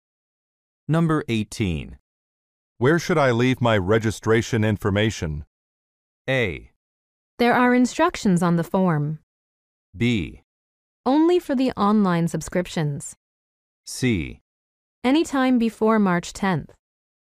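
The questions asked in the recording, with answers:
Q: Where should I leave my registration information?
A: A: There are instructions on the form.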